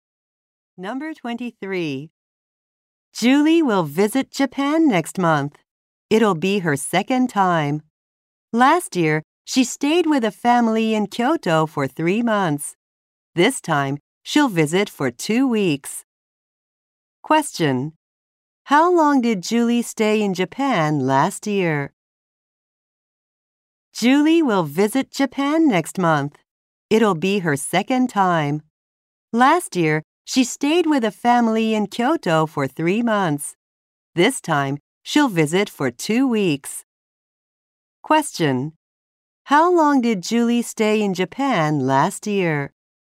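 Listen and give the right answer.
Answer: For 3 months.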